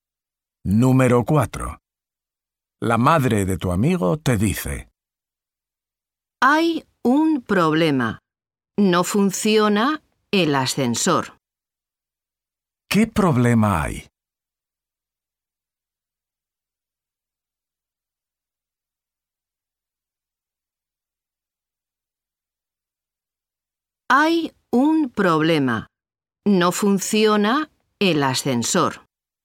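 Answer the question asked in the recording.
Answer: No funciona el ascensor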